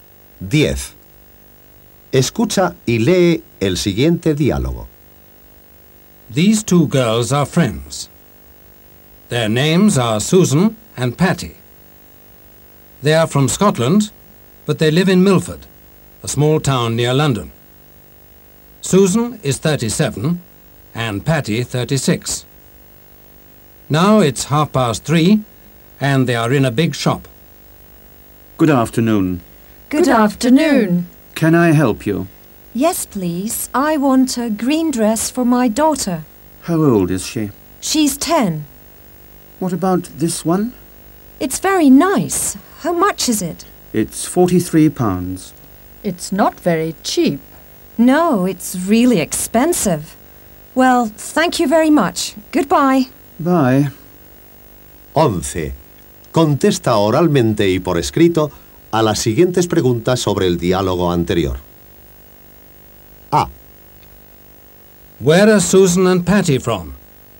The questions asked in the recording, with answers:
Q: Where are Susan and Patty from?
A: They are from Scotland.